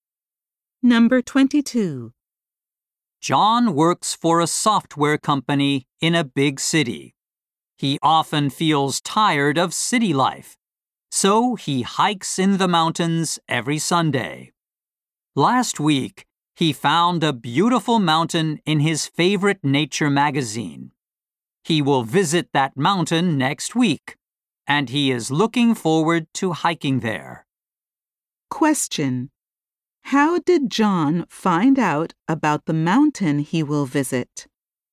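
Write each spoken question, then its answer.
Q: How did John find out about the mountain he will visit?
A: He saw it in a nature magazine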